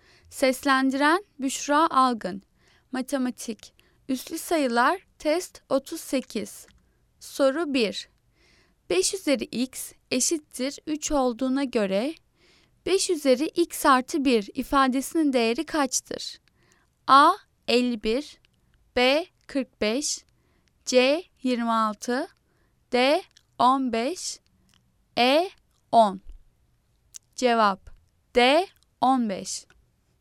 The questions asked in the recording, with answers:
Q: 5 üzeri x eşittir 3 olduğuna göre 5 üzeri x artı 1 ifadesinin değeri kaçtır?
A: Cevap D. 15.